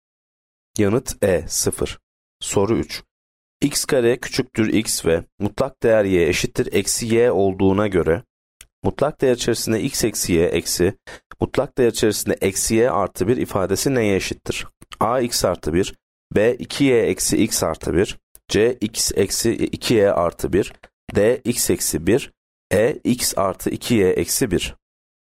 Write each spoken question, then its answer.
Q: X kare küçüktür x ve mutlak değer y eşittir eksi y olduğuna göre mutlak değer içerisinde x eksi y eksi, mutlak değer içerisinde eksi y artı 1 ifadesi neye eşittir?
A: Yanıt D, x eksi 1.